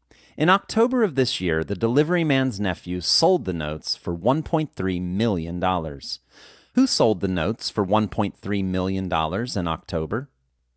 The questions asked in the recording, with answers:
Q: Who sold the notes for $1.3 million in October?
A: The delivery man's nephew sold the notes for $1.3 million in October.